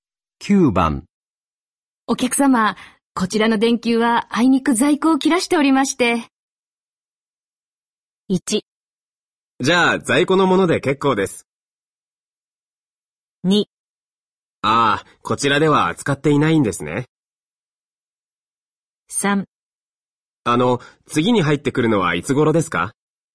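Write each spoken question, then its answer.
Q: お客様、こちらの電球はあいにく在庫を切らしておりまして。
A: 3: あの、次に入ってくるのはいつ頃ですか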